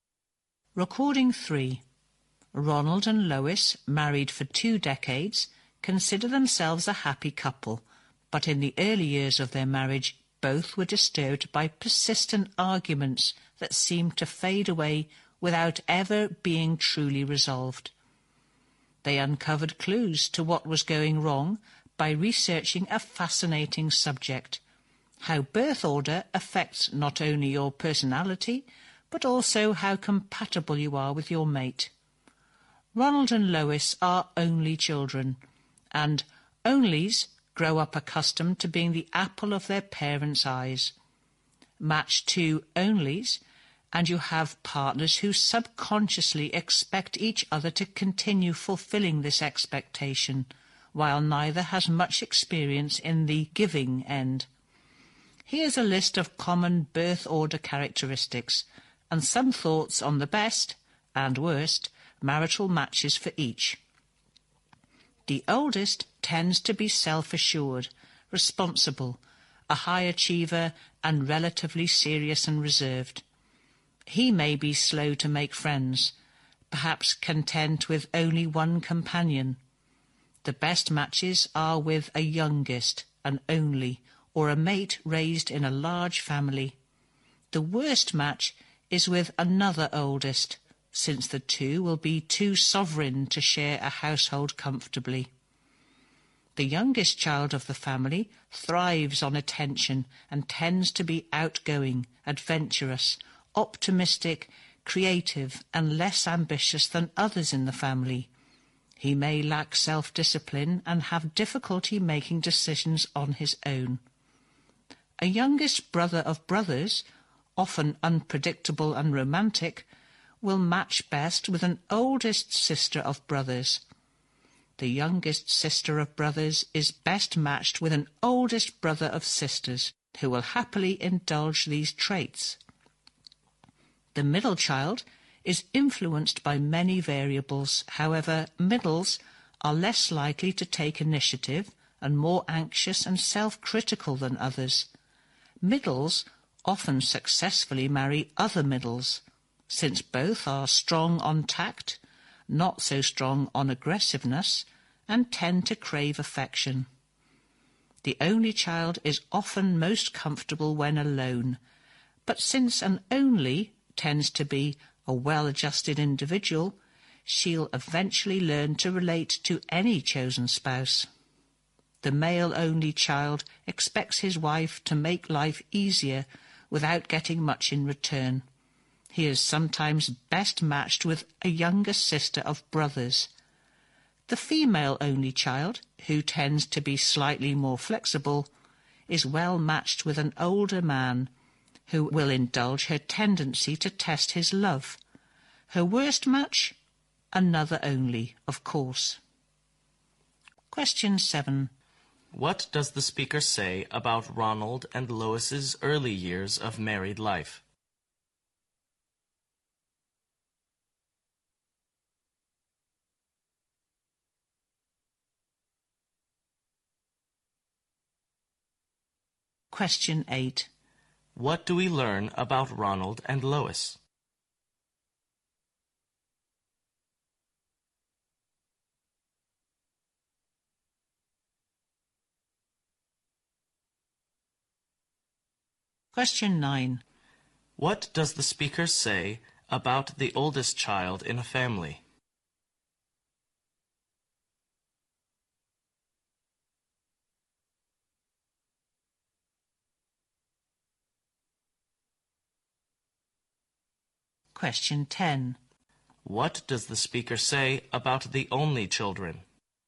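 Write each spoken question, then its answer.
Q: What does the speaker say about Ronald and Lois's early years of married life?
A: They were disturbed by persistent arguments that never seemed to be truly resolved.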